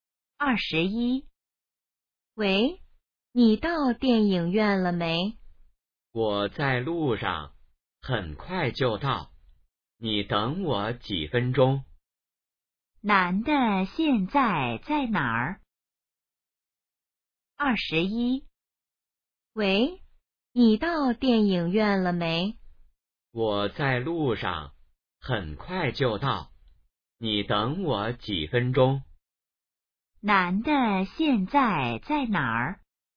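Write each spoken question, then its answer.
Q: 男的现在在哪儿?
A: 在路上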